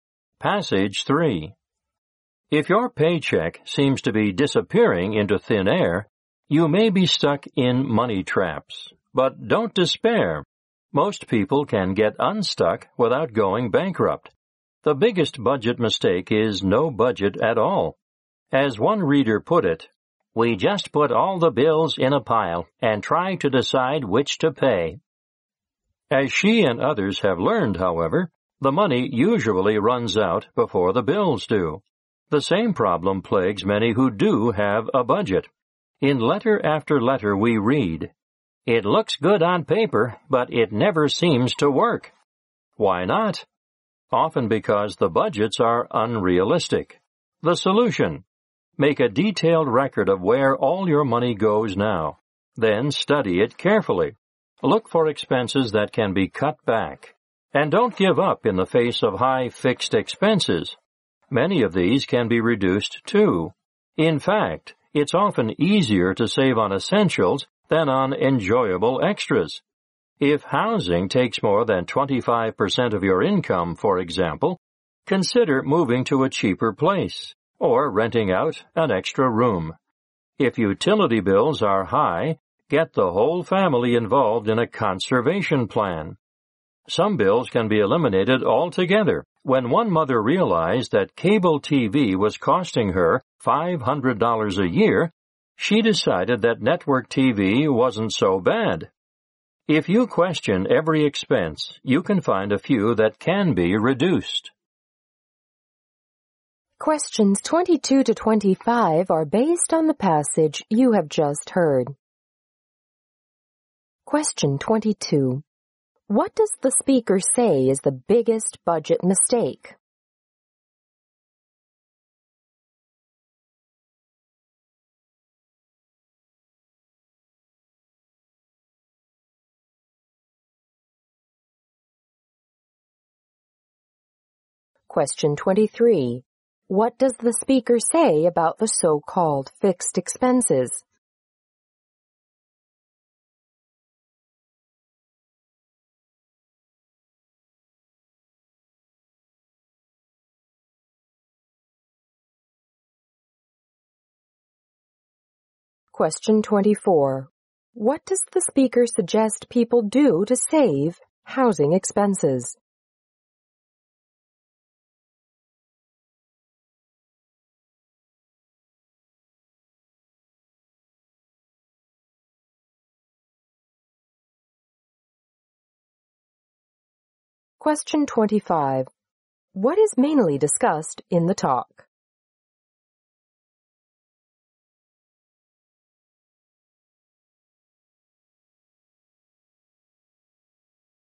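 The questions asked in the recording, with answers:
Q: What does the speaker say is the biggest budget mistake?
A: Having no budget at all.

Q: What does the speaker say about the so-called fixed expenses?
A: Many of them can be reduced too.

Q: What does the speaker suggest people do to save housing expenses?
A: Move to a cheaper place or rent out an extra room.

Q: What is mainly discussed in the talk?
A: How to get out of money traps by budgeting and cutting expenses.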